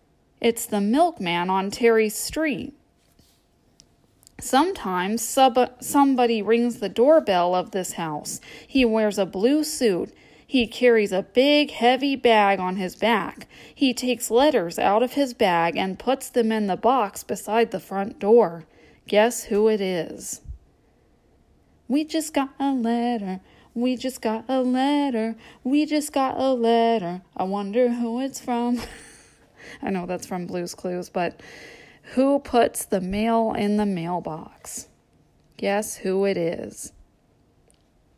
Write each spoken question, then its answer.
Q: Guess who it is?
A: It's the postman on Terry's street.